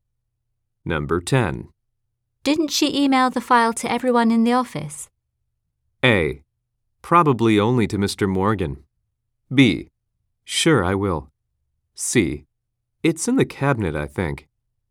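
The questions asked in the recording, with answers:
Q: Didn't she email the file to everyone in the office?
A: A: Probably only to Mr. Morgan.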